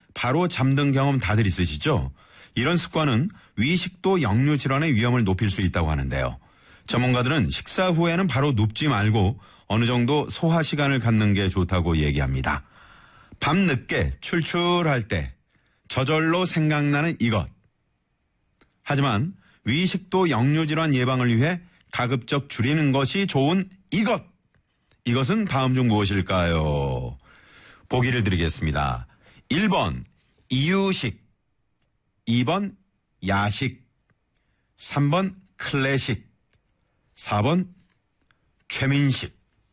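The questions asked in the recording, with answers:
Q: 이것은 다음 중 무엇일까요?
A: 2번: 야식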